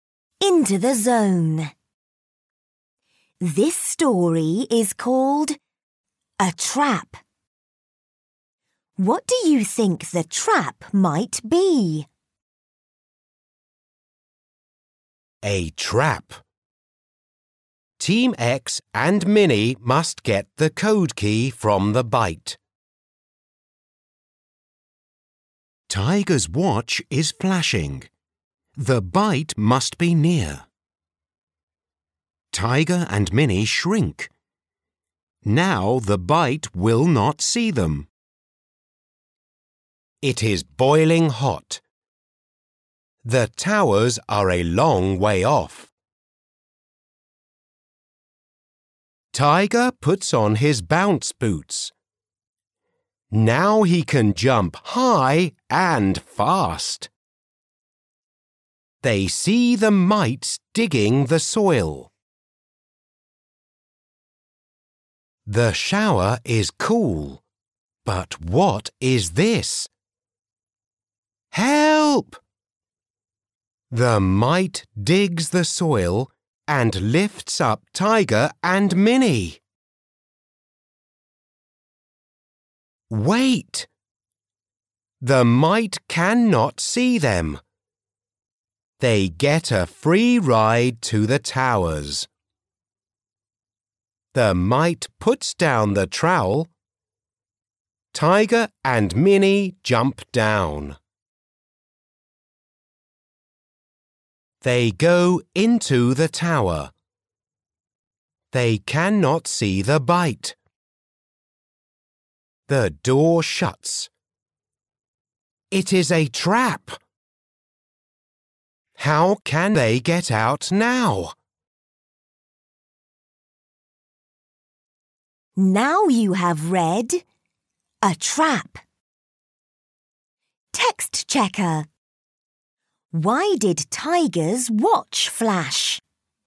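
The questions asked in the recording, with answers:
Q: Why did Tiger's watch flash?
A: Because the bite was near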